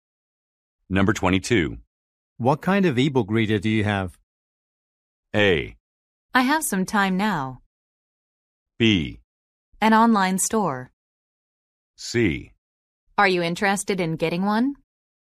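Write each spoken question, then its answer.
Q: What kind of ebook reader do you have?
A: C: Are you interested in getting one?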